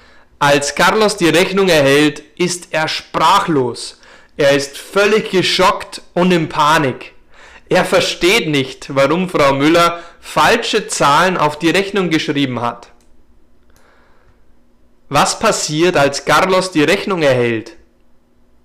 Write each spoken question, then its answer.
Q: Was passiert, als Carlos die Rechnung erhält?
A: Carlos ist völlig geschockt und in Panik.